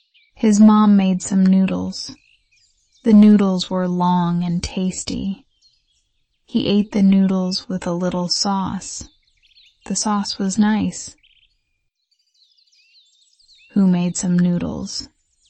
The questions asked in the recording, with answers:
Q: Who made some noodles?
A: His mom. His mom made some noodles.